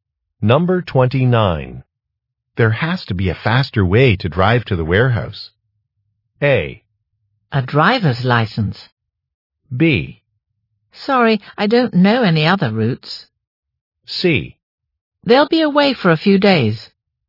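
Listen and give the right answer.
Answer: B: Sorry, I don't know any other routes.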